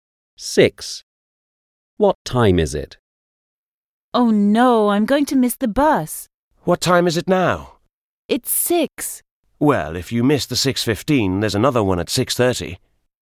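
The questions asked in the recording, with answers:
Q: What time is it?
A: 6 o'clock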